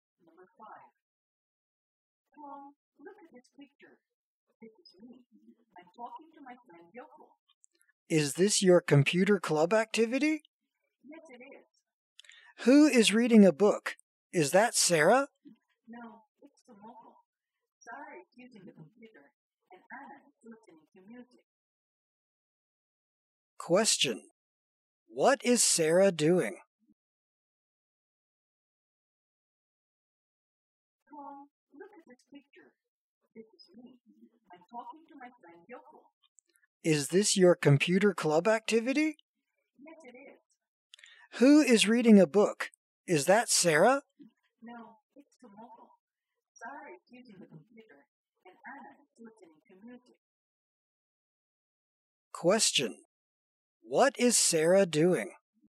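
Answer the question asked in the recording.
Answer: Using the computer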